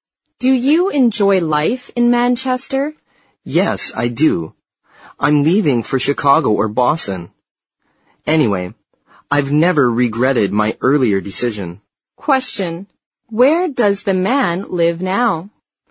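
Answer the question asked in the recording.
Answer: In Manchester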